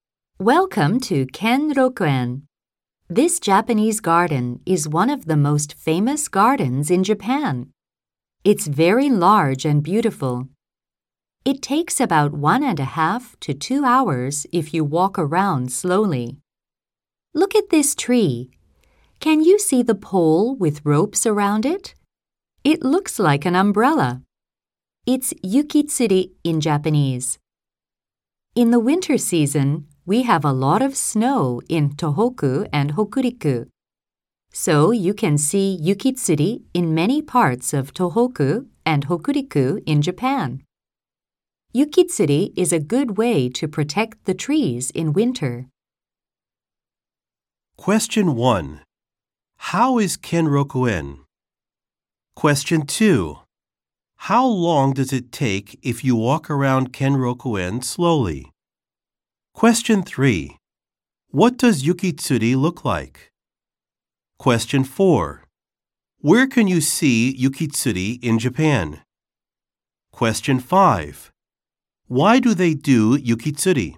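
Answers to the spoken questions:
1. It's very large and beautiful.
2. About 1.5 to 2 hours.
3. An umbrella.
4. In many parts of Tohoku and Hokuriku.
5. To protect the trees in winter.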